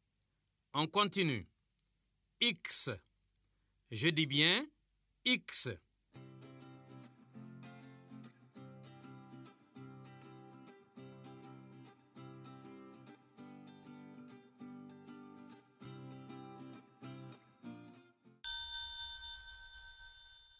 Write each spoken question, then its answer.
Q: On continue. X. Je dis bien X.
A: Monsieur, la lettre qui vient avant X, c'est W.